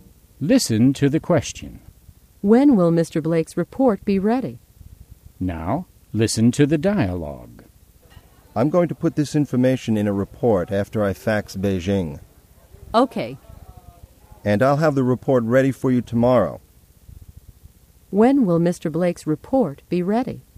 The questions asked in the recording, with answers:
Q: When will Mr. Blake's report be ready?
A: It will be ready tomorrow.